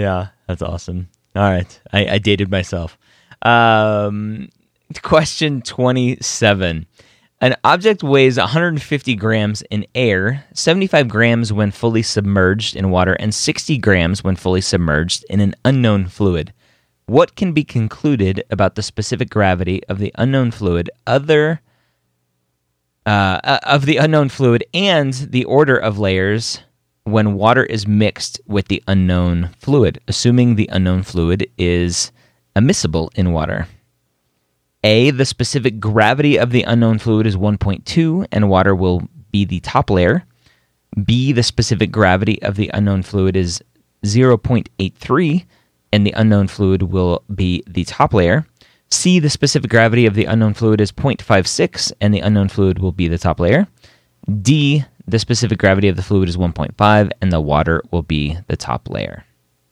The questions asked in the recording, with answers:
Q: What can be concluded about the specific gravity of the unknown fluid and the order of layers when water is mixed with the unknown fluid, assuming the unknown fluid is immiscible in water?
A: And so 1.2, it's just a little bit denser than water.